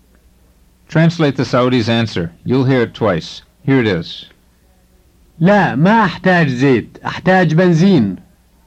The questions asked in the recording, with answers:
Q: Translate the Saudi's answer.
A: The Saudi said, no, I don't need oil. I need gasoline.